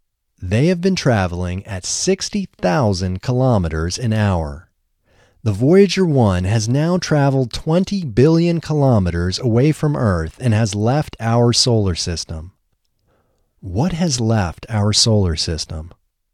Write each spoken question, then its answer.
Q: What has left our solar system?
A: The Voyager 1 has left our solar system.